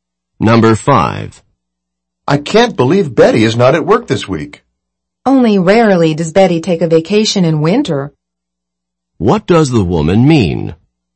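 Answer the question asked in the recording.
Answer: It's unusual for Betty to take a winter vacation.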